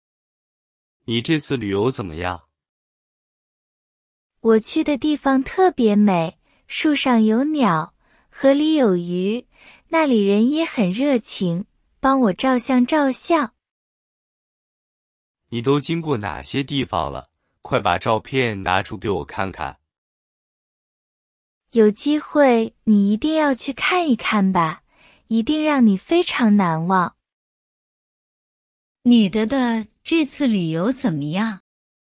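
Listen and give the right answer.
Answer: 很好,去的地方特别美,人也很热情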